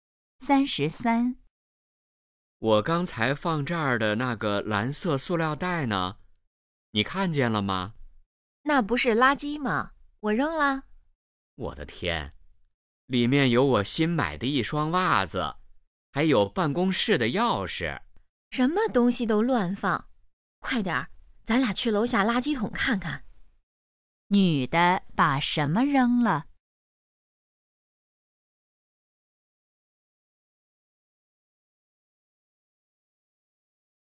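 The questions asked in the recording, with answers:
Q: 女的把什么扔了?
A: 一个蓝色塑料袋(里面有袜子和钥匙)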